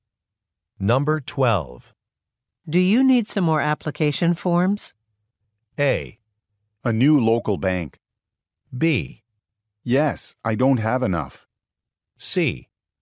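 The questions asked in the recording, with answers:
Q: Do you need some more application forms?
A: B: Yes, I don't have enough.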